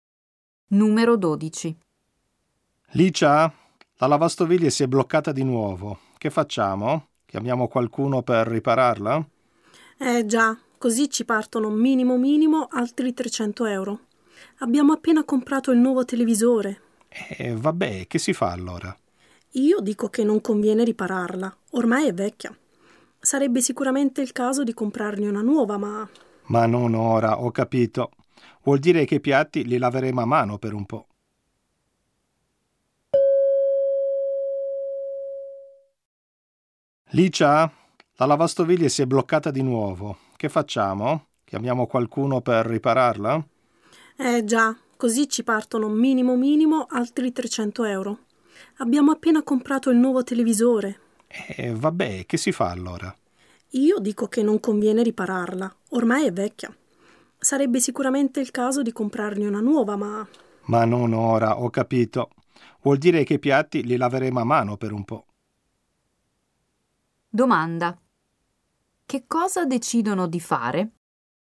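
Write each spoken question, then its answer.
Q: che cosa decidono di fare?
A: Lavare i piatti a mano per un po', senza riparare né comprare subito la lavastoviglie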